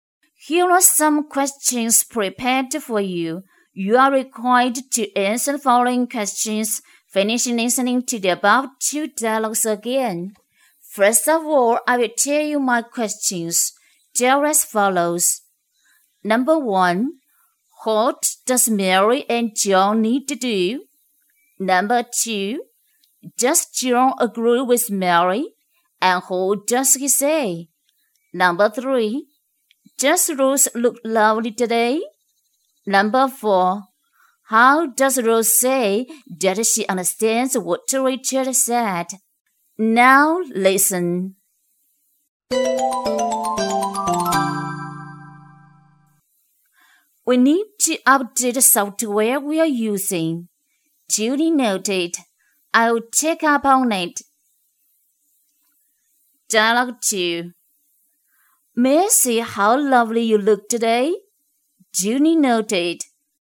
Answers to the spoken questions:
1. They need to update the software they are using.
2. Yes, he does. John says Junie noted and check up on it.
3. Yes, she does.
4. Rose says it by Junie noted.